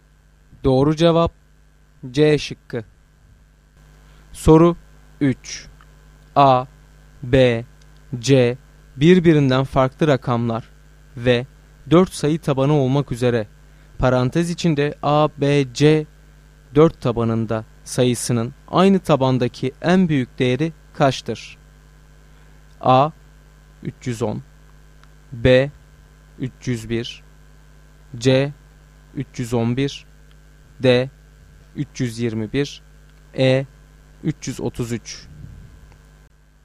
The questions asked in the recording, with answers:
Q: A, B, C birbirinden farklı rakamlar ve 4 sayı tabanı olmak üzere parantez içinde A, B, C 4 tabanında sayısının aynı tabandaki en büyük değeri kaçtır?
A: Doğru cevap D şıkkı.